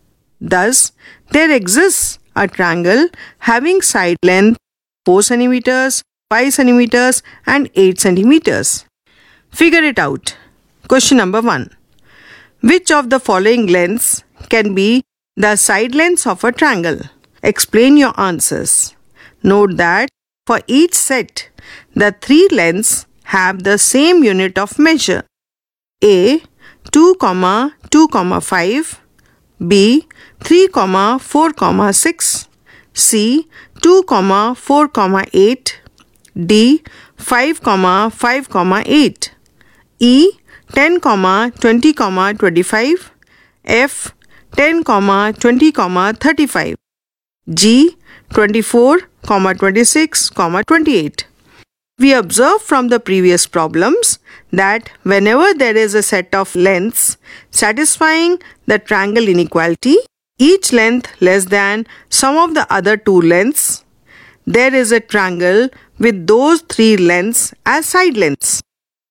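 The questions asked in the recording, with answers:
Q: Which of the following lengths can be the side lengths of a triangle?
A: B: 3, 4, 6; D: 5, 5, 8; E: 10, 20, 25; G: 24, 26, 28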